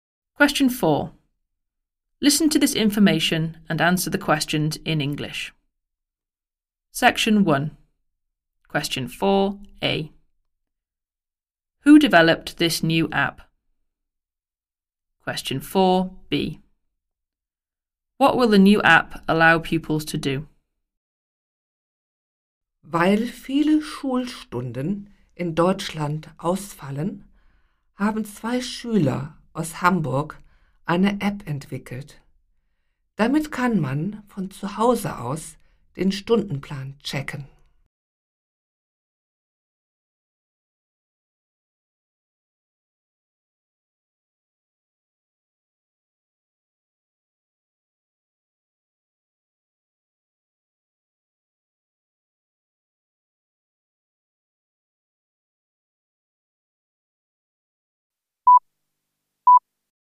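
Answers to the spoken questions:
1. Two pupils from Hamburg
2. Check their timetable from home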